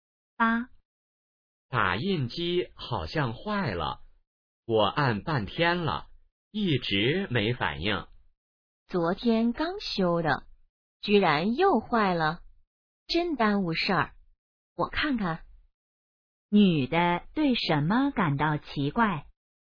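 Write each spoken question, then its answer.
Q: 女的对什么感到奇怪?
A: 打印机昨天刚修又坏了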